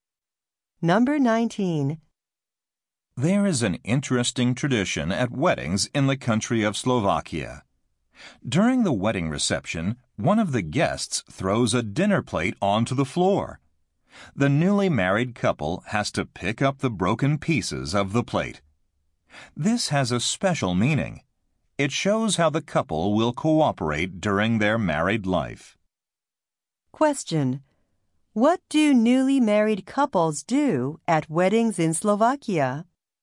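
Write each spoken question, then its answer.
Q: What do newly married couples do at weddings in Slovakia?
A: Pick up the pieces of a broken plate.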